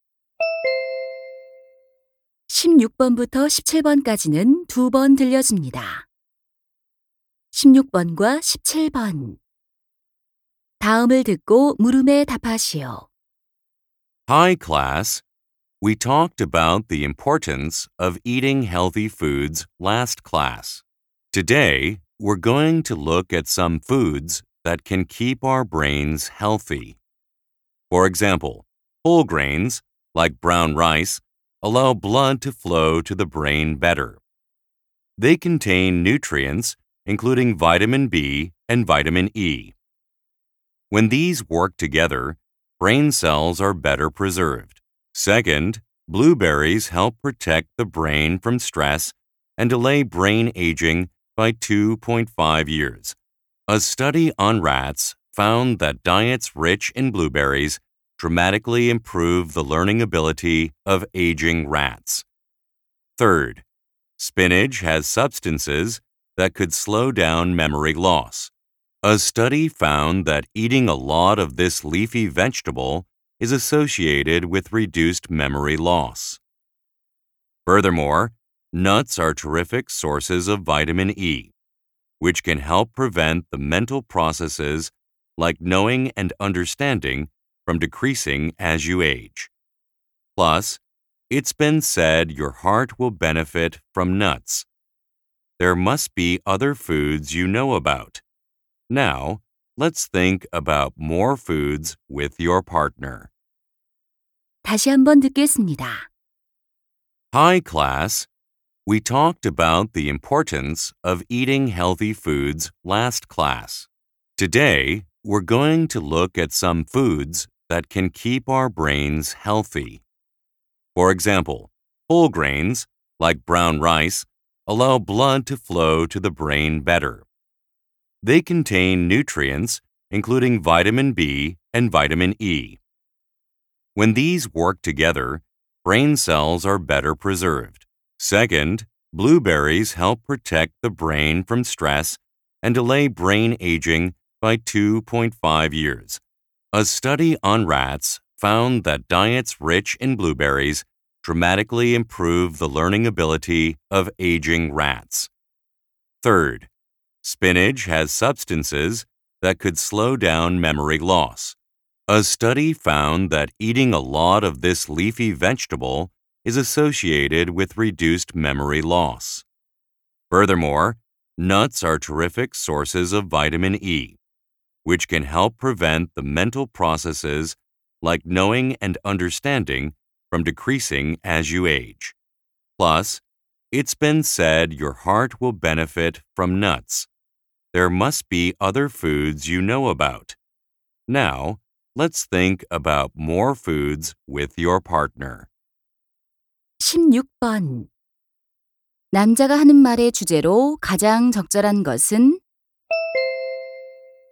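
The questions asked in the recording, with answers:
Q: 남자가 하는 말의 주제로 가장 적절한 것은?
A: 뇌 건강에 좋은 음식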